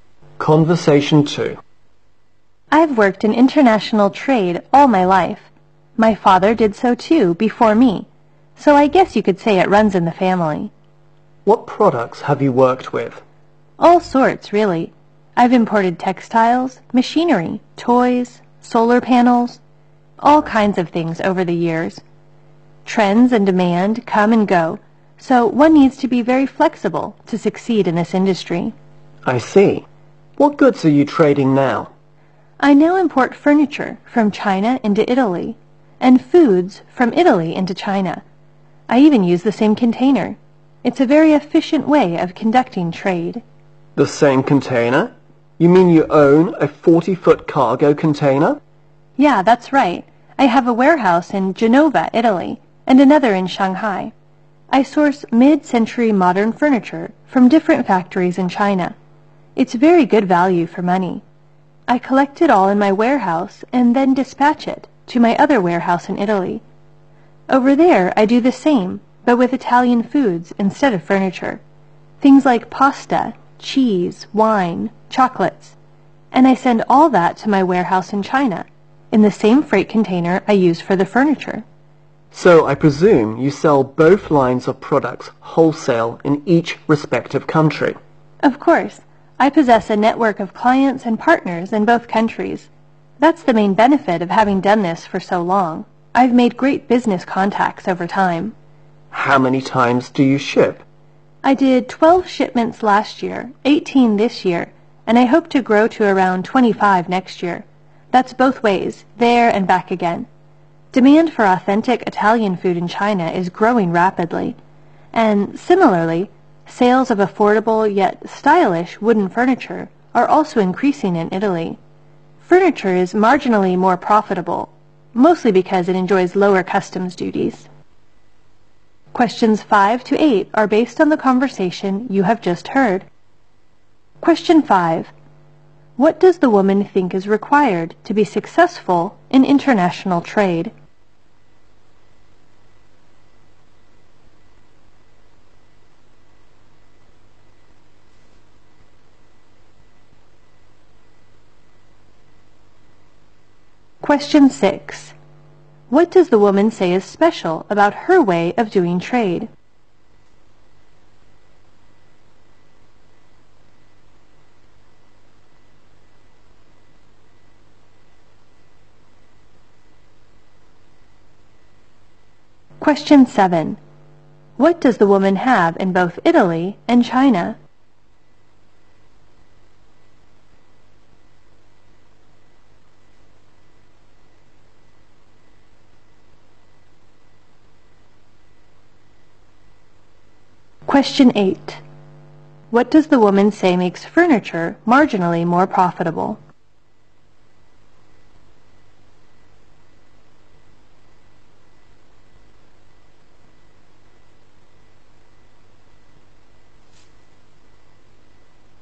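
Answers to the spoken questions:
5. Being very flexible
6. She uses the same container for goods in both directions
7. A warehouse
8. Lower customs duties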